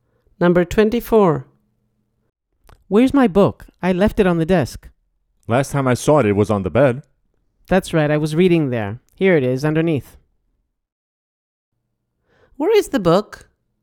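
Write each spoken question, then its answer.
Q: Where is the book?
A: under the bed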